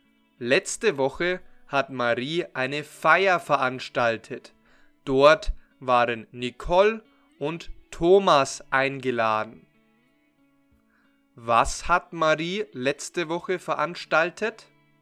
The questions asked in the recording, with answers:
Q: Was hat Marie letzte Woche veranstaltet?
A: Eine Feier. Sie hat eine Feier, also eine Party, veranstaltet.